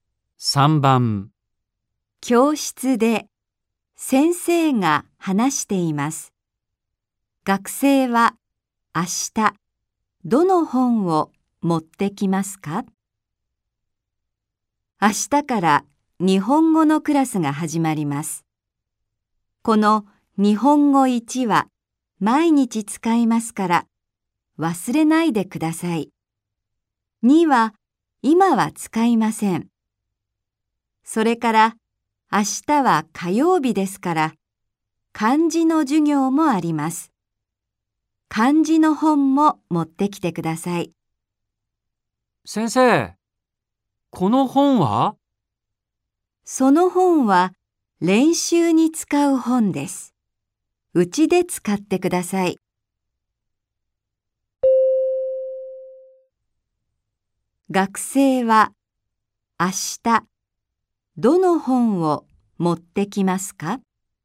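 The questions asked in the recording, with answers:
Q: 学生は明日どの本を持ってきますか?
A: 日本語1と漢字の本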